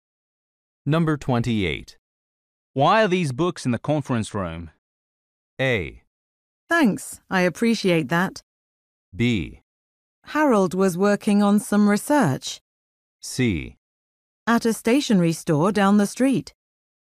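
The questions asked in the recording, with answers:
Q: Why are these books in the conference room?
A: B: Harold was working on some research.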